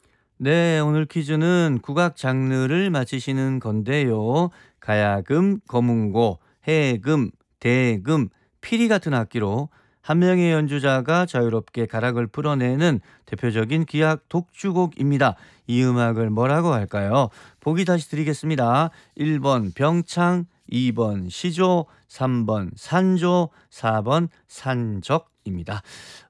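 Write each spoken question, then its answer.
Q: 이 음악을 뭐라고 할까요?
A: 3: 산조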